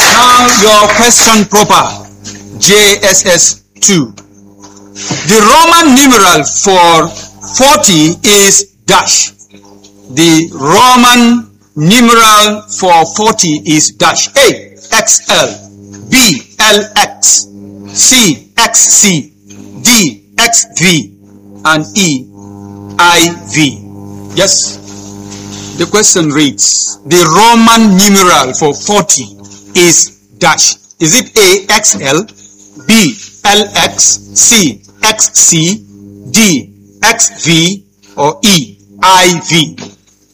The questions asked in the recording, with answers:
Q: The Roman numeral for 40 is dash.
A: Letter A is XL.